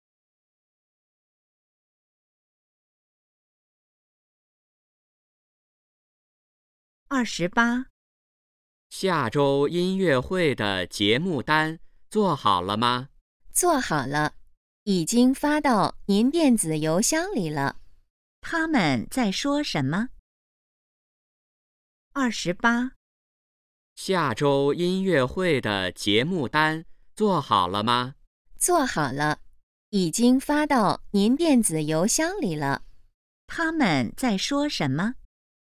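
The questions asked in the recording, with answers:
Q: 他们在说什么?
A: 音乐会的节目单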